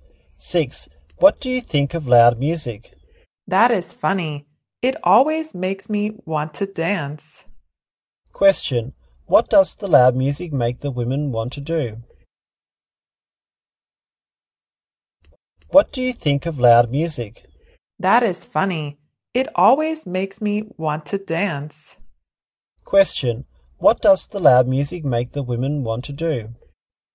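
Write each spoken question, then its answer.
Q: What does the loud music make the women want to do?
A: Dance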